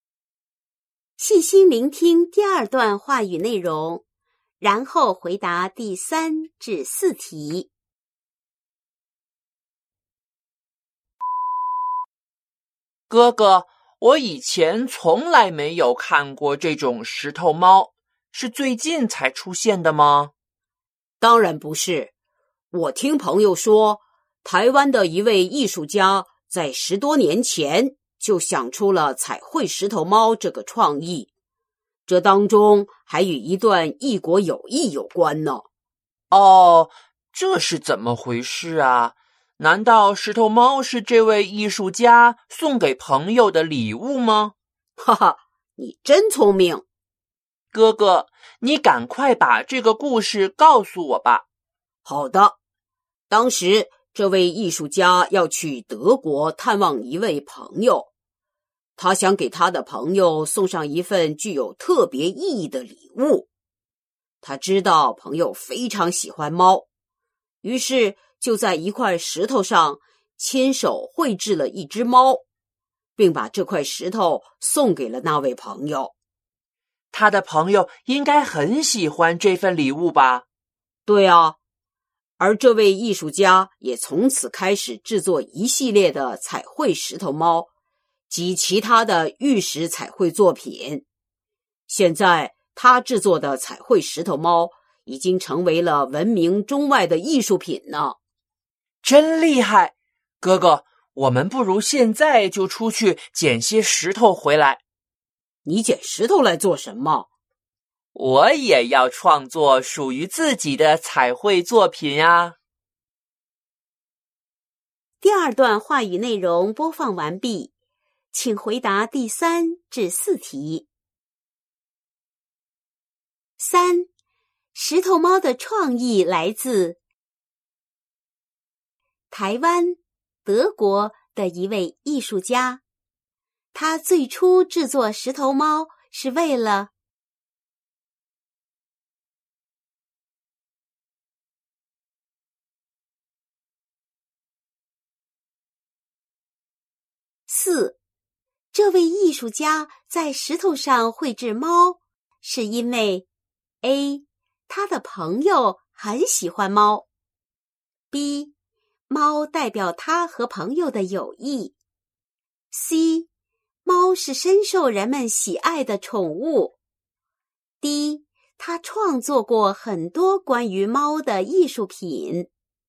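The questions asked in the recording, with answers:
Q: 这位艺术家在石头上绘制猫,是因为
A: A: 他的朋友很喜欢猫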